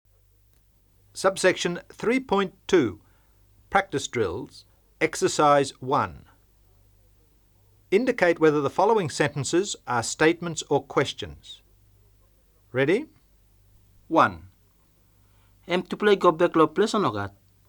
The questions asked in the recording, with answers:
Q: Indicate whether the following sentences are statements or questions.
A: Question.